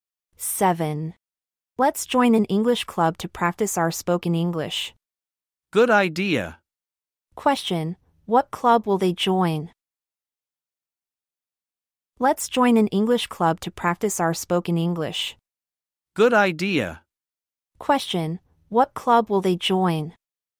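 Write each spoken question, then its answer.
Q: What club will they join?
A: An English club.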